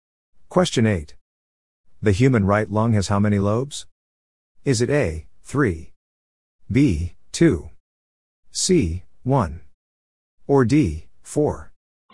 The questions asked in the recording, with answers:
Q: The human right lung has how many lobes?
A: The answer is A, 3.